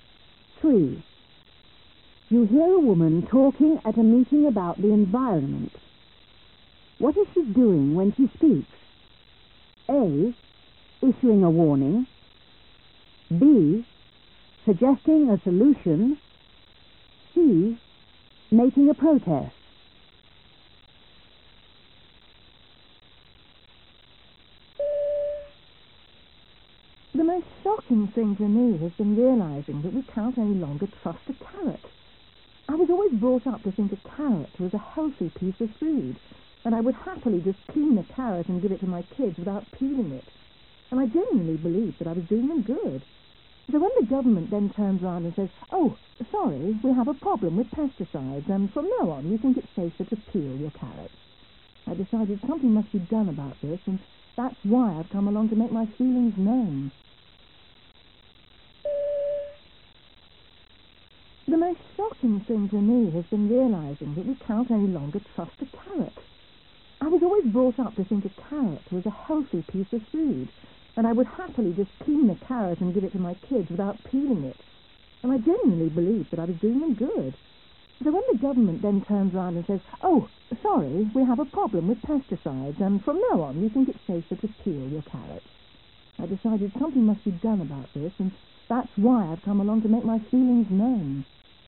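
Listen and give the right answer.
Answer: C: Making a protest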